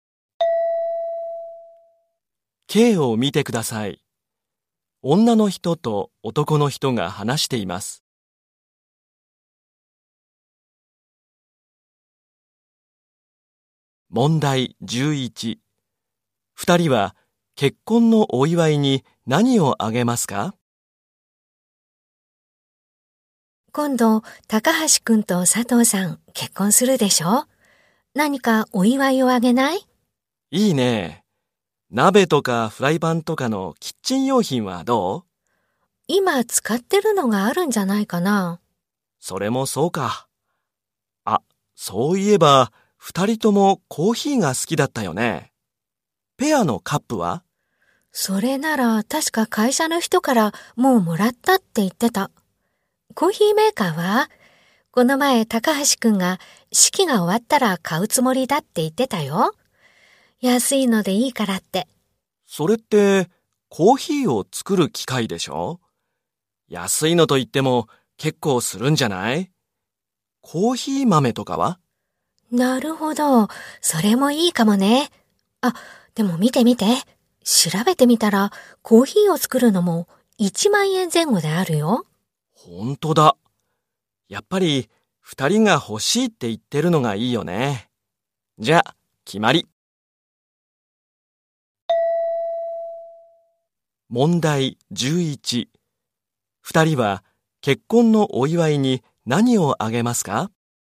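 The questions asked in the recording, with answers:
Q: 二人は結婚のお祝いに何をあげますか?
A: コーヒーメーカー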